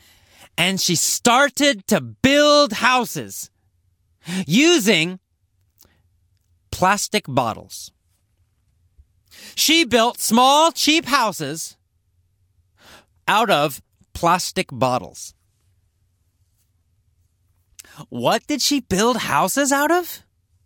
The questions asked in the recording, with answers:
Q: What did she build houses out of?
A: Out of plastic bottles. She built houses out of plastic bottles.